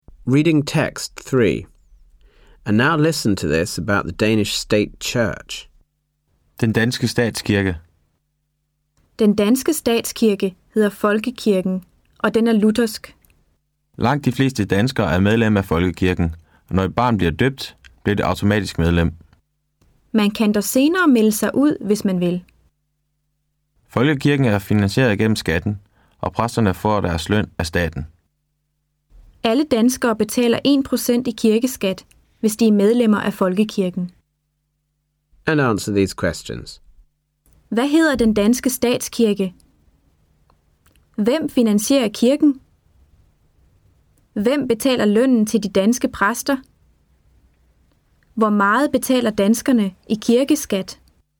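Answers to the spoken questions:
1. Folkekirken
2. Den finansieres gennem skatten
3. Staten
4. 1%, hvis de er medlemmer af Folkekirken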